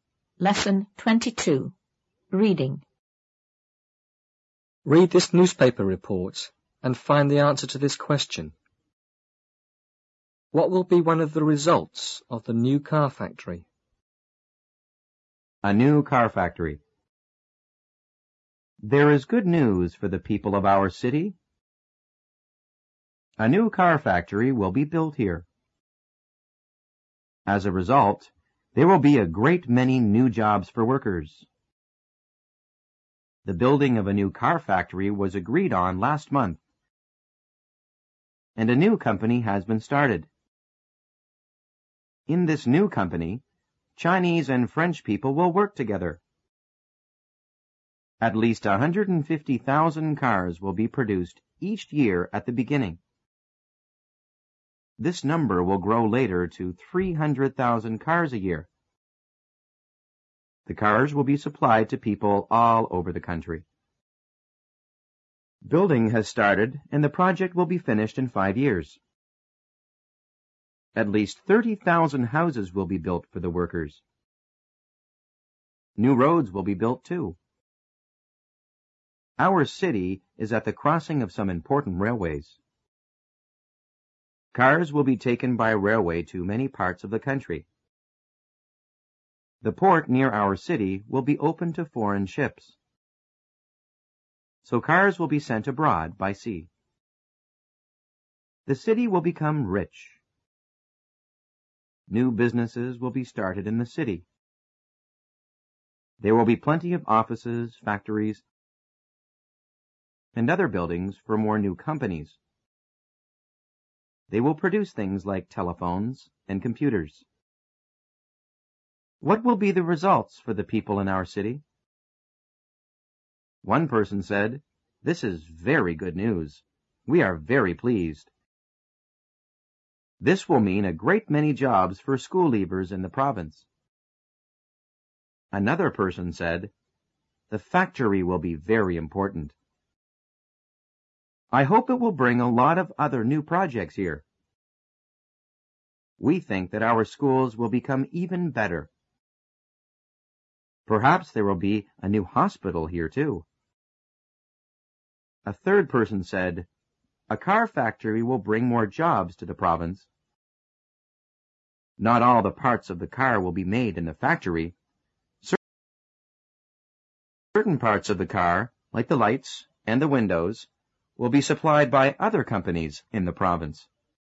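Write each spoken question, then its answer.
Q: What will be one of the results of the new car factory?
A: There will be a great many new jobs for workers.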